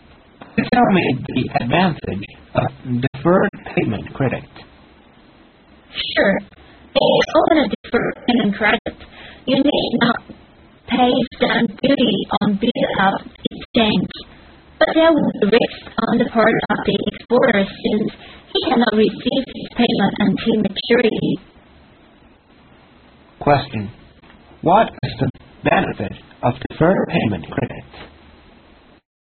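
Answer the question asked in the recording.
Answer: No stamp duty on bill of exchange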